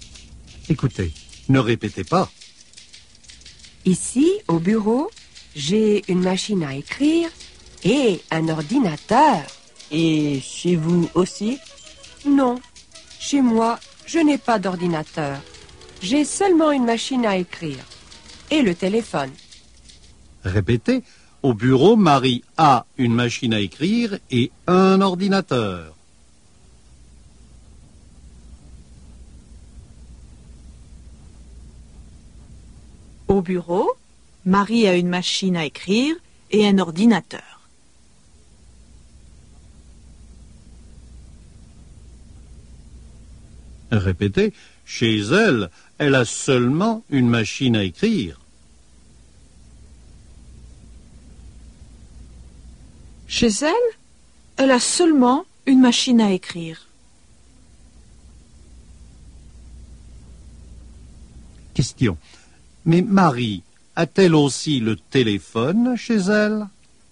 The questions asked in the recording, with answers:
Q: Mais Marie a-t-elle aussi le téléphone chez elle?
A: Oui, Marie a aussi le téléphone chez elle.